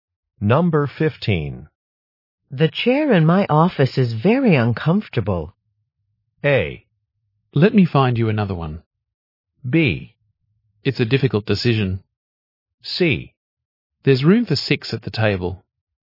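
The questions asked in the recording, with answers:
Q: The chair in my office is very uncomfortable.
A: A: Let me find you another one.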